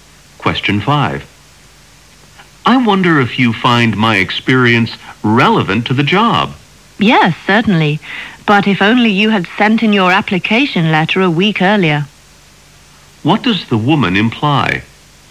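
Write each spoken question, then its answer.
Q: What does the woman imply?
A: The man applied too late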